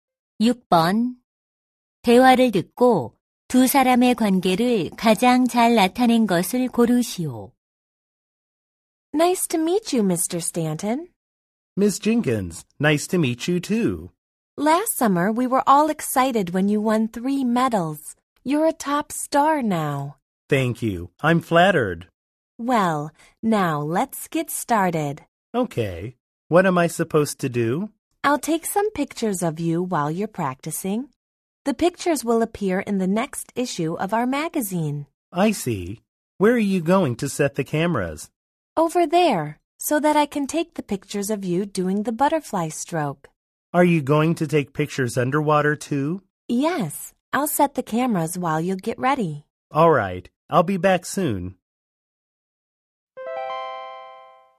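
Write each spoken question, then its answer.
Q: 대화를 듣고 두 사람의 관계를 가장 잘 나타낸 것을 고르시오.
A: 잡지사 사진작가 – 수영 선수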